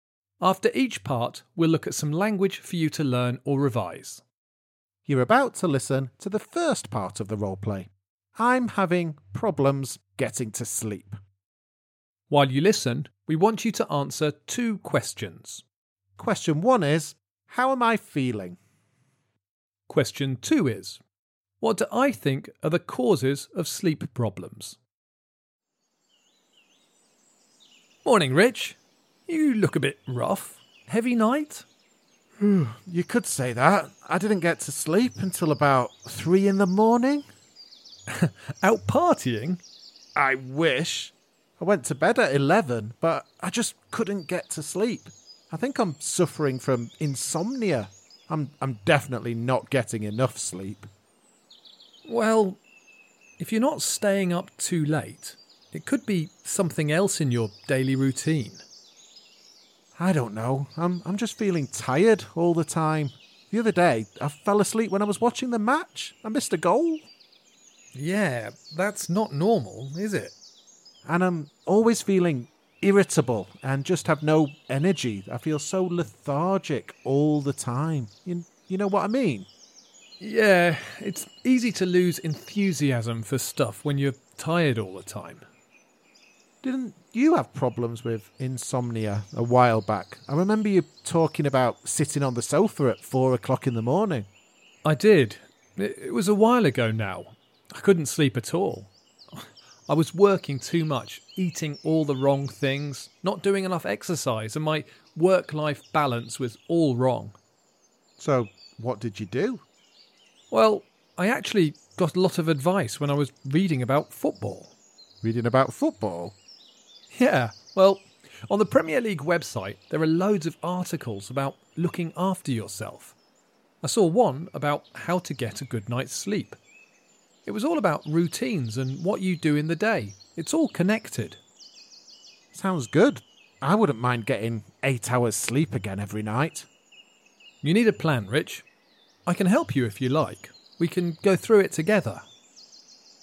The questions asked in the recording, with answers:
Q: how am I feeling?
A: Well, Rich mentioned feeling irritable, which is when you get annoyed or angry very easily.